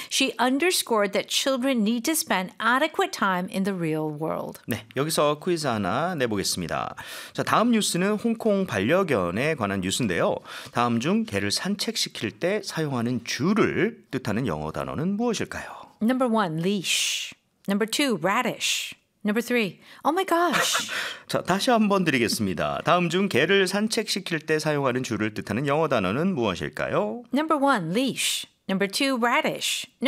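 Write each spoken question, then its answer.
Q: 다음 중 개를 산책시킬 때 사용하는 줄을 뜻하는 영어 단어는 무엇일까요?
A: 1: leash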